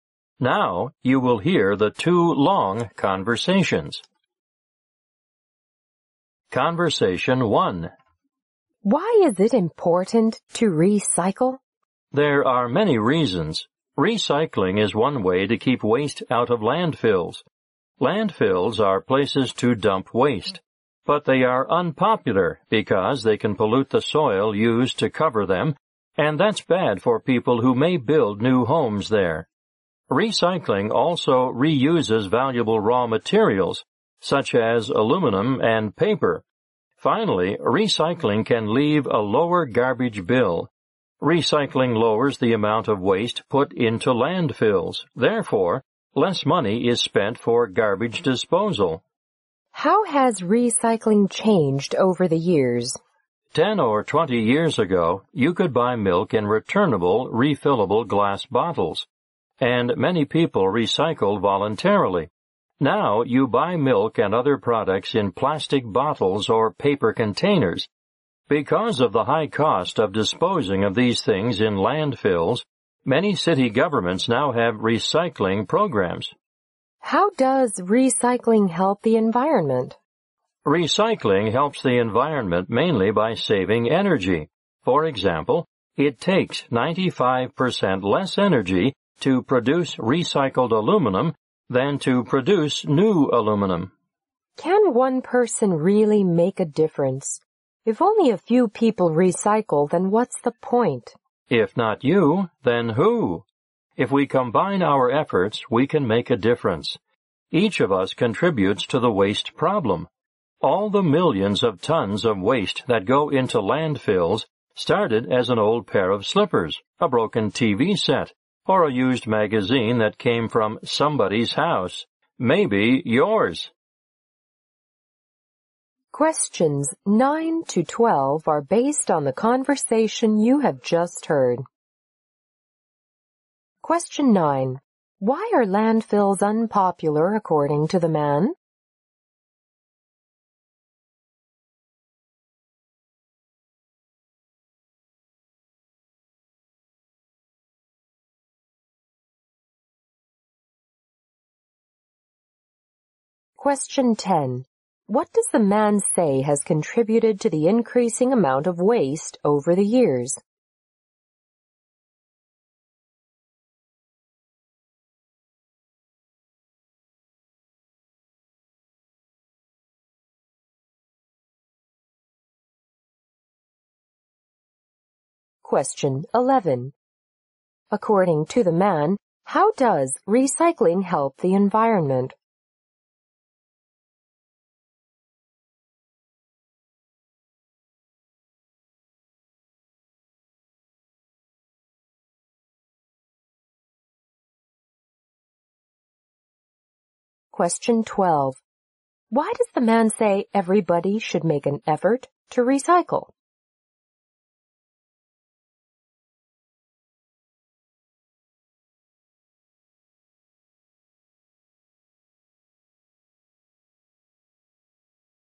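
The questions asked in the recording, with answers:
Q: Why are landfills unpopular according to the man?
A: They can pollute the soil used to cover them.

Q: What does the man say has contributed to the increasing amount of waste over the years?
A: Products now come in plastic bottles or paper containers instead of refillable glass bottles.

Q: According to the man, how does recycling help the environment?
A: Mainly by saving energy.

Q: Why does the man say everybody should make an effort to recycle?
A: Everyone contributes to the waste problem, and together we can make a difference.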